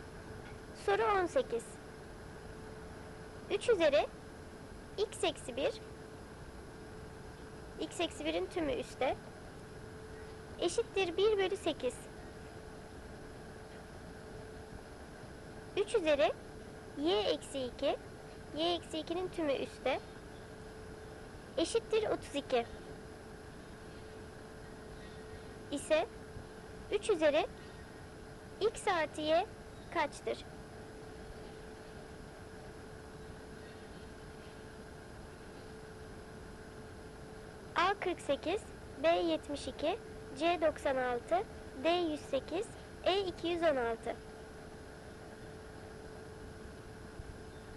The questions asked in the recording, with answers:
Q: İse 3 üzeri x artı y kaçtır?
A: Doğru cevap D 108.